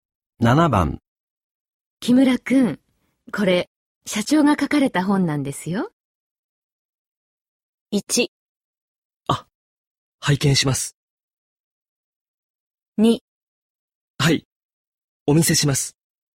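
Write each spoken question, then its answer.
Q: 木村くん、これ、社長が書かれた本なんですよ。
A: 1: あ、拝見します。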